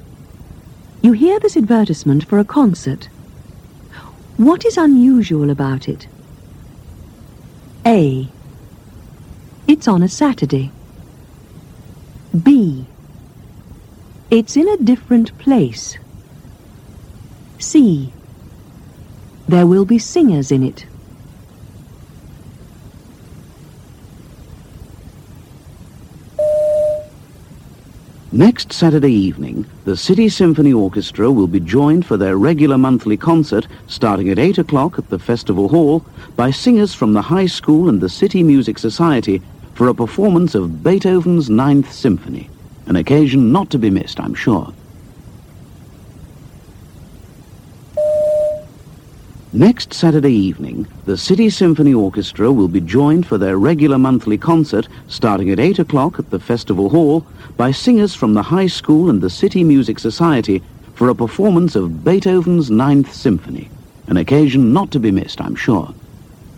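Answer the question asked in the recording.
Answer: C: There will be singers in it.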